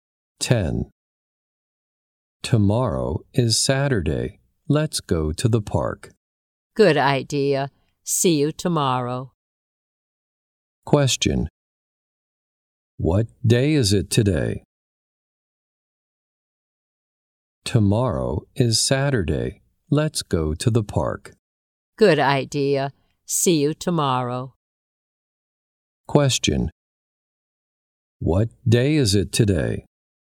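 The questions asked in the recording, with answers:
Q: What day is it today?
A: Friday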